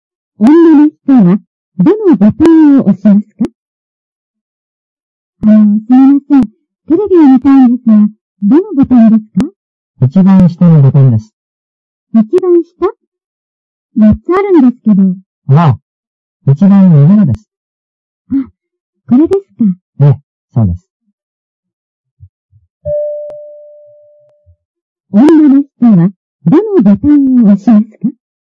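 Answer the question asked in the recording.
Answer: 一番上のボタン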